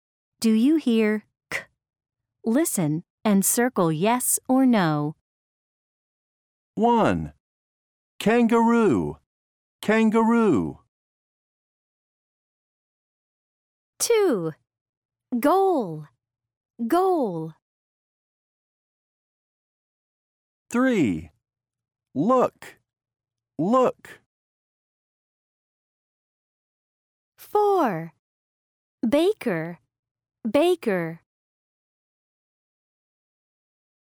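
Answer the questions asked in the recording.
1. yes
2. no
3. yes
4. yes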